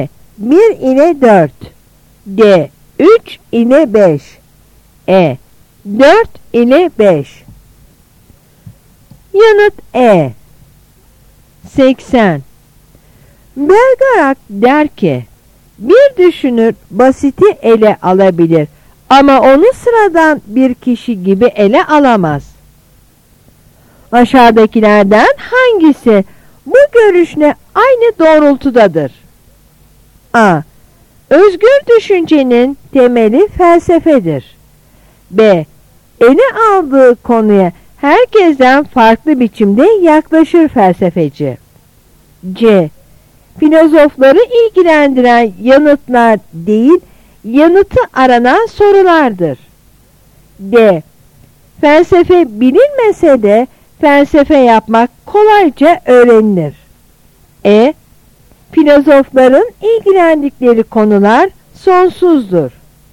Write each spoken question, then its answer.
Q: Aşağıdakilerden hangisi bu görüşle aynı doğrultudadır?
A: Yanıt B.